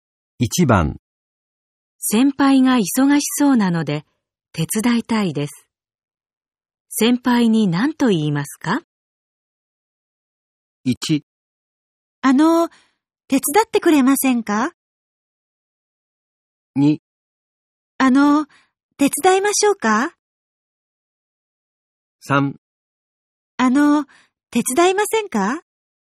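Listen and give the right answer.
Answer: 2: 手伝いましょうか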